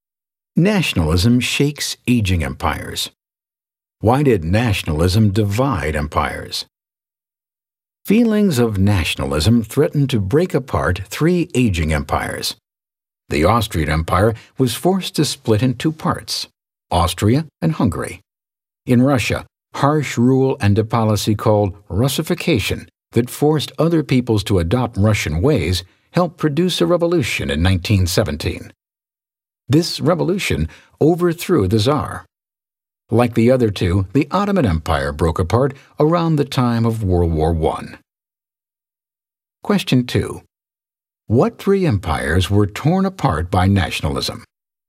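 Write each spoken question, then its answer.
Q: What three empires were torn apart by nationalism?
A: The Austrian, Russian, and Ottoman empires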